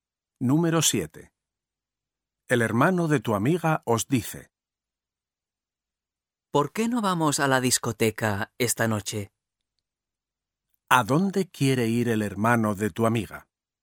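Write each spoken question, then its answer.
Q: ¿A dónde quiere ir el hermano de tu amiga?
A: a la discoteca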